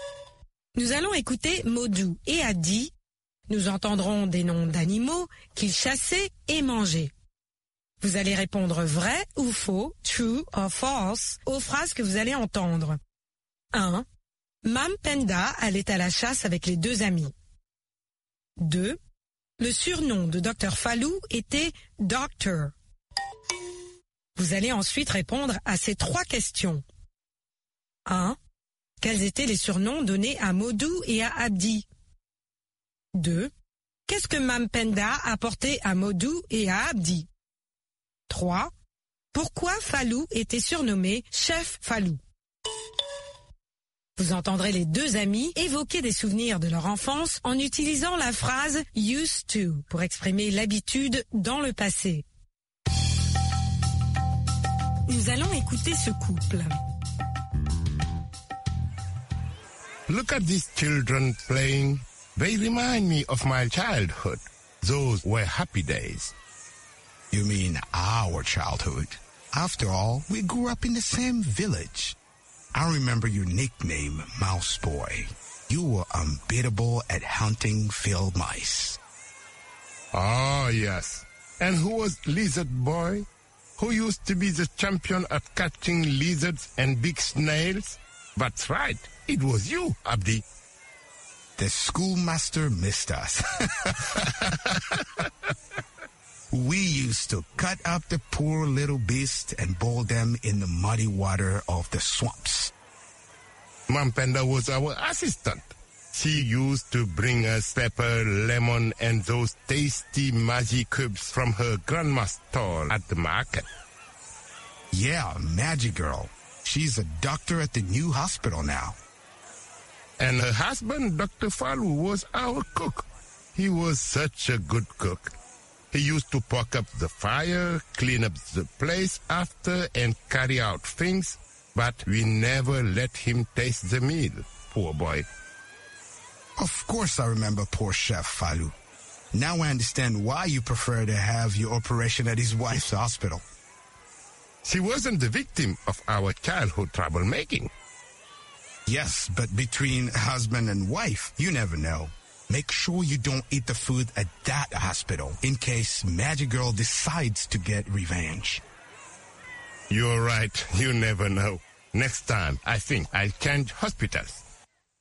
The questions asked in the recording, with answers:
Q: Mam Penda allait à la chasse avec les deux amis.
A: L'énoncé 1 est faux.

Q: Le surnom de Dr. Fallou était Doctor.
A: L'énoncé 2 est faux.

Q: Quels étaient les surnoms donnés à Modou et à Abdi?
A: Mice Boy et Lizard Boy.

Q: Qu'est-ce que Mam Penda a porté à Modou et à Abdi?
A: Mam Panda a porté aux deux amis du poivre, du citron et des cubes Maggi.

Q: Pourquoi Fallou était surnommé Chef Fallou?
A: Parce qu'il leur faisait la cuisine.